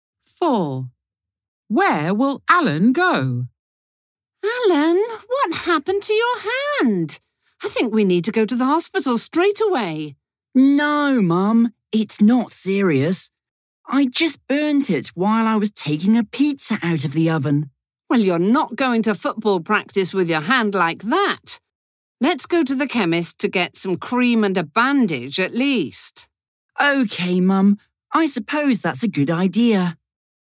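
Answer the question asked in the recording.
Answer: To the chemist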